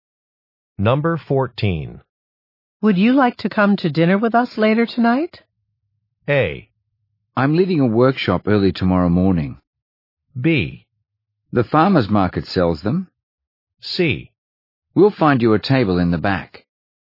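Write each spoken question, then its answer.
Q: Would you like to come to dinner with us later tonight?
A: A: I'm leading a workshop early tomorrow morning.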